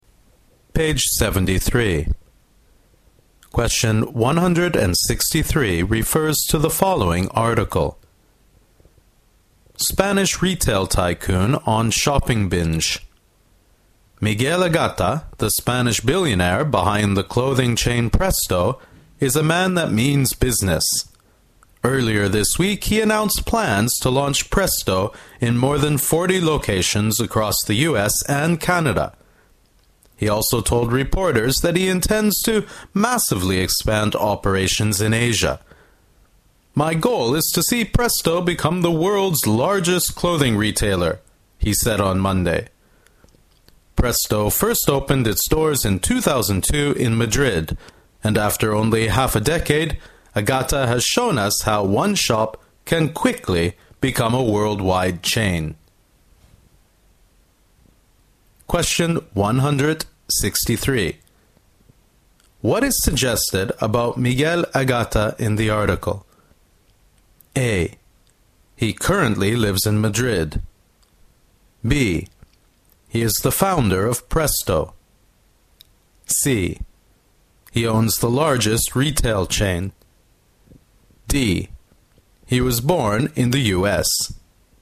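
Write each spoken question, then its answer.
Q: What is suggested about Miguel Agata in the article?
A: B: He is the founder of Presto.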